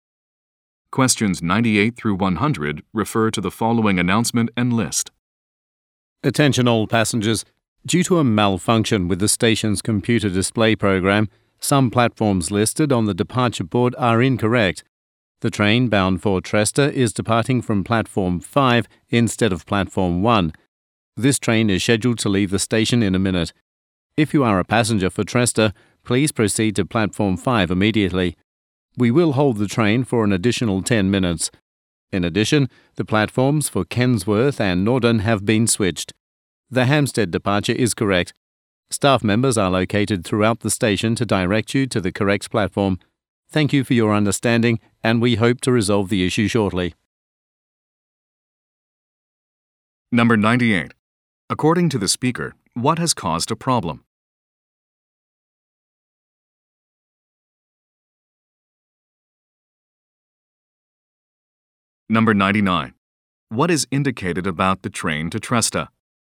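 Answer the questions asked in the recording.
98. A malfunction of the station's computer display program
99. It departs from Platform 5 and will be held for 10 more minutes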